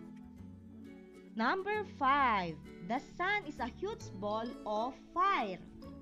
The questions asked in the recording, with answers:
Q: The sun is a huge ball of fire.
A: It is a fact.